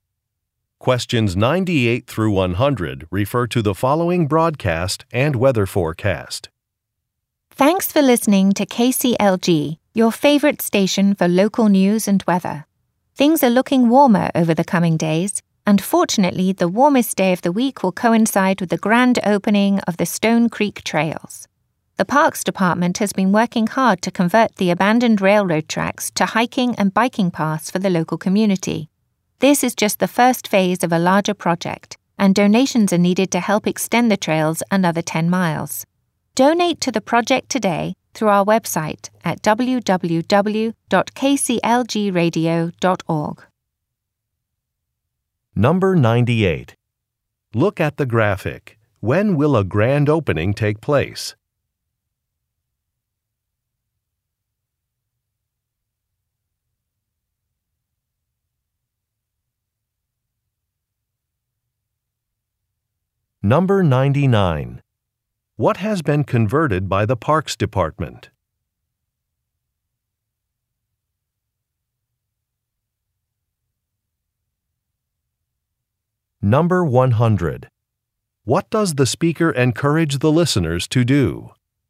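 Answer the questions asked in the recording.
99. Abandoned railroad tracks
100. Donate to the project through the website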